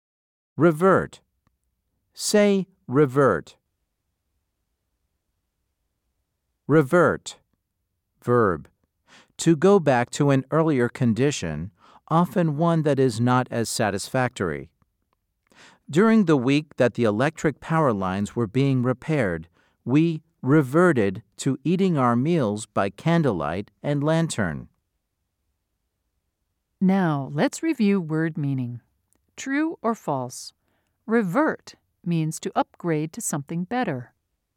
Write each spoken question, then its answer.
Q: True or false? Revert means to upgrade to something better.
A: If you said false, you are correct.